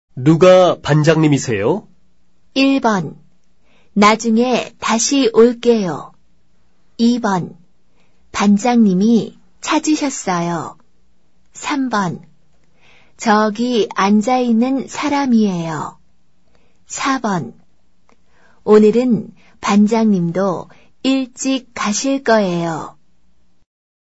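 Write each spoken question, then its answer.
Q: 누가 반장님이세요?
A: 3: 저기 앉아있는 사람이에요.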